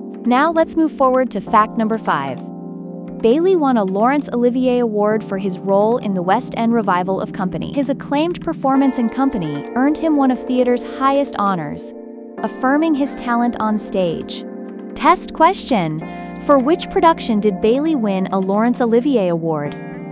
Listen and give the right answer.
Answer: Correct answer, Company.